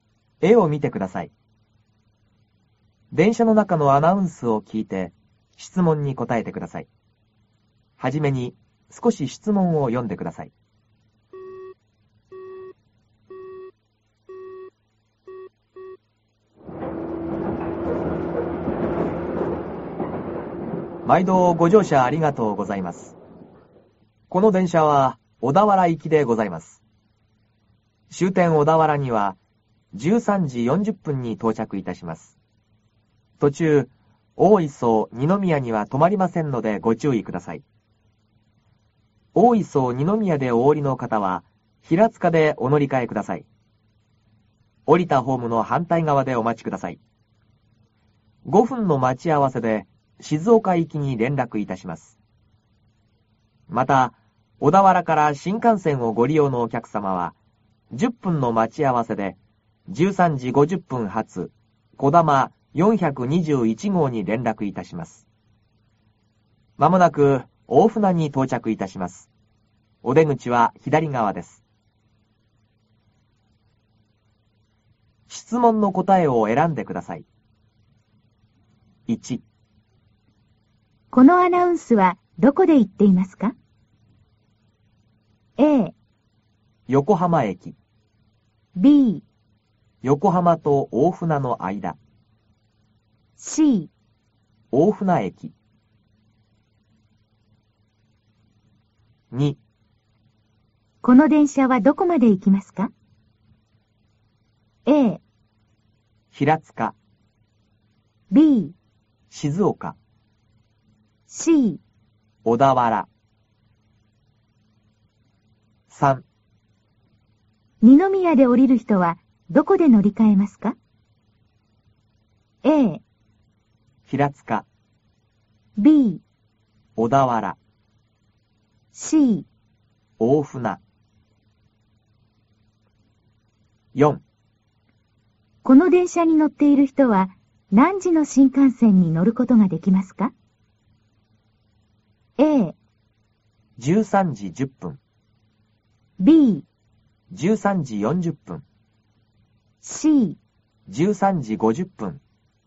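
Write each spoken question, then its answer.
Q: この電車はどこまで行きますか?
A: C: 小田原

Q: 二宮で降りる人はどこで乗り換えますか?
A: A: 平塚

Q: この電車に乗っている人は何時の新幹線に乗ることができますか?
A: C: 13時50分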